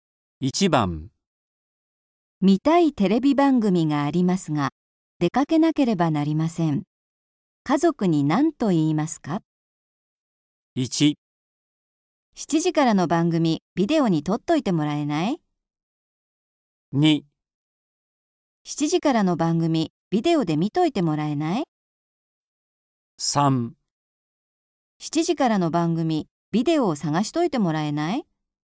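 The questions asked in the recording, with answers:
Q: 家族に何と言いますか?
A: 1: 7時からの番組、ビデオに撮っといてもらえない?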